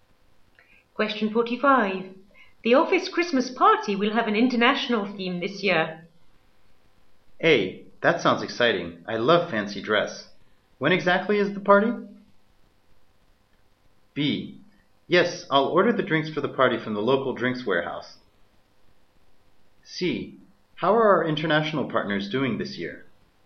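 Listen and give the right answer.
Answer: A: That sounds exciting. I love fancy dress.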